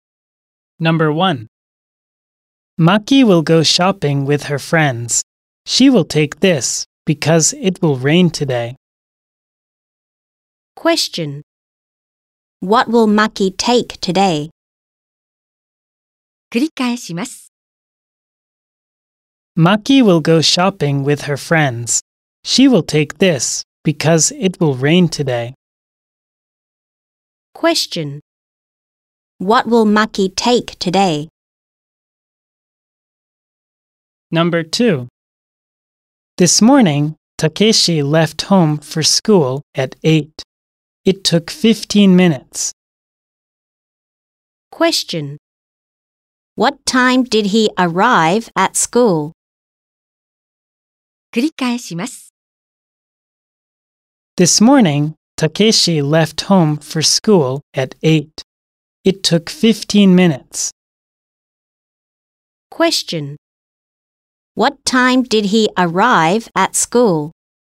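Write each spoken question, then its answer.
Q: What time did he arrive at school?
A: At 8:15.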